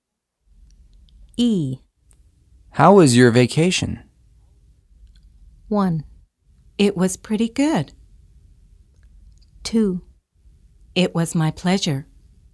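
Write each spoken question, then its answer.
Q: How was your vacation?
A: 1: It was pretty good.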